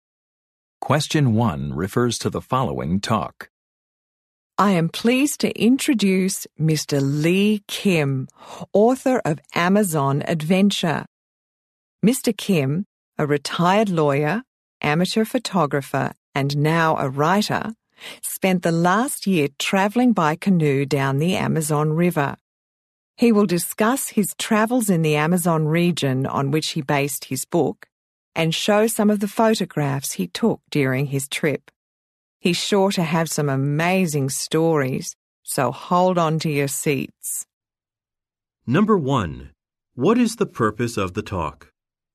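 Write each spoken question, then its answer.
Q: What is the purpose of the talk?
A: To introduce a speaker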